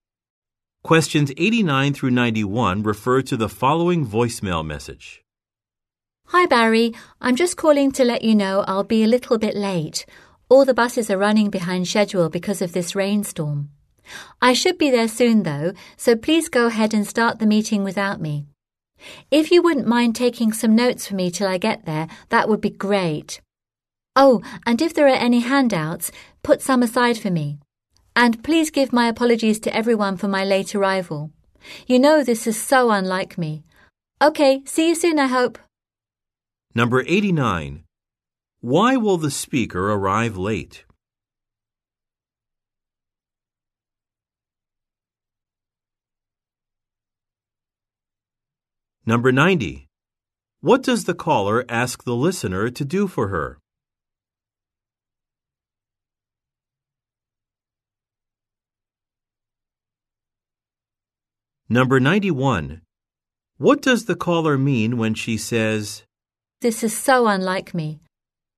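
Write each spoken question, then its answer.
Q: Why will the speaker arrive late?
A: The buses are delayed by the rainstorm

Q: What does the caller ask the listener to do for her?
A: Take notes and save handouts

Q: What does the caller mean when she says,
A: She is usually on time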